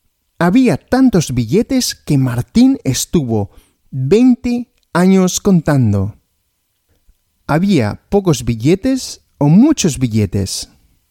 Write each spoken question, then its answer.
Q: ¿Había pocos billetes o muchos billetes?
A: Muchos, había muchos billetes.